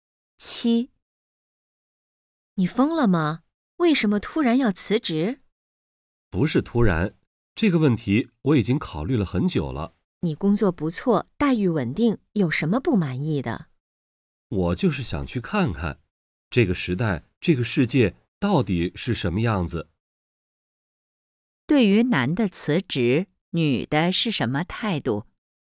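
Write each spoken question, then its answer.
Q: 对于男的辞职,女的是什么态度?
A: 不赞成/不理解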